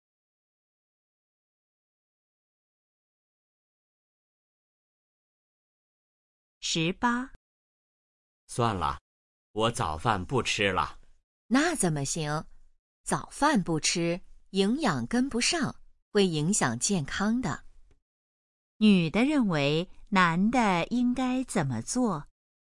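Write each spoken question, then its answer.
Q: 女的认为男的应该怎么做?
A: 吃早饭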